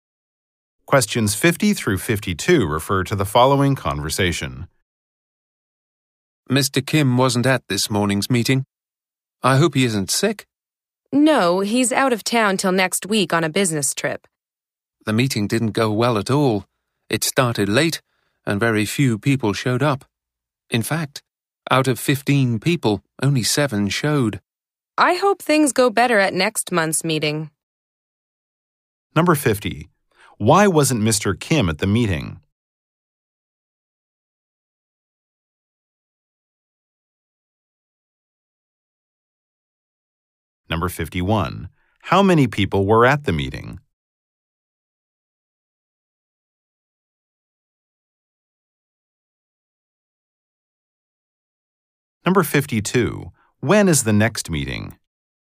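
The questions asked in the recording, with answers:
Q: Why wasn't Mr.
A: He is on a business trip

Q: When is the next meeting?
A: Next month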